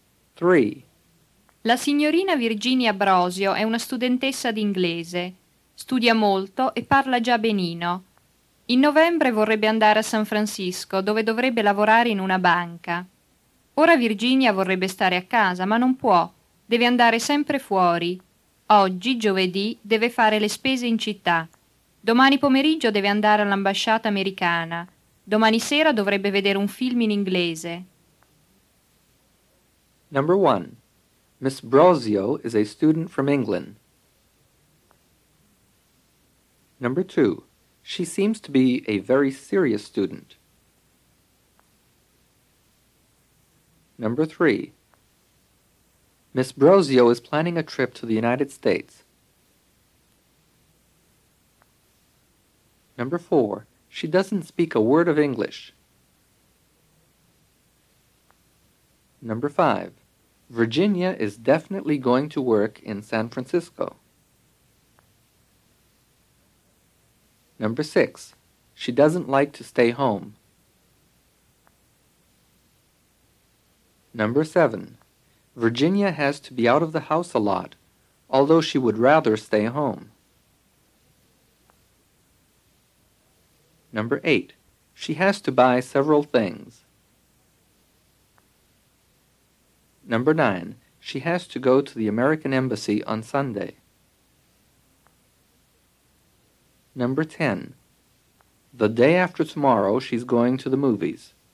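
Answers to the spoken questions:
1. False
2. True
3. True
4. False
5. False
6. False
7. True
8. True
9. False
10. False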